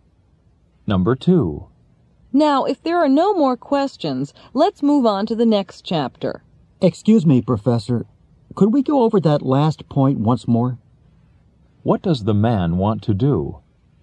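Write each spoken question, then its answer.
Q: What does the man want to do?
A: Review the last point again.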